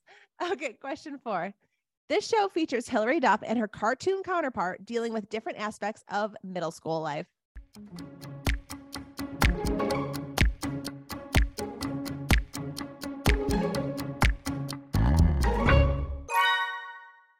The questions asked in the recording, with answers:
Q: This show features Hilary Duff and her cartoon counterpart dealing with different aspects of middle school life.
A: Only the best show ever, Lizzie McGuire.